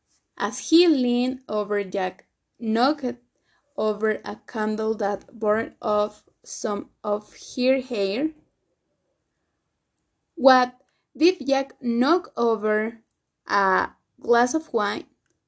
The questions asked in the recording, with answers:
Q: What did Jack knock over a glass of wine?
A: No, he didn't knock over a glass of wine.